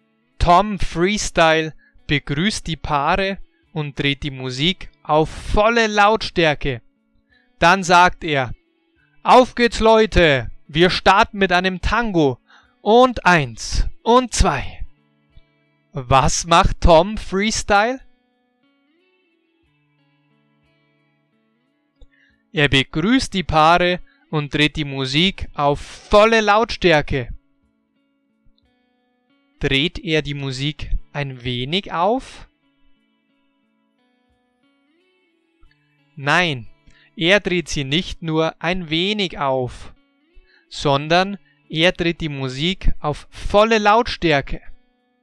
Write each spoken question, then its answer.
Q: Was macht Tom Freestyle?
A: Er begrüßt die Paare und dreht die Musik auf volle Lautstärke.